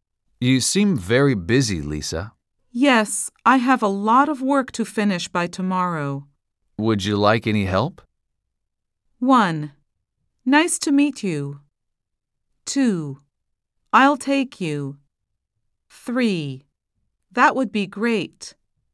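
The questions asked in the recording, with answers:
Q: Would you like any help?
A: 3: That would be great.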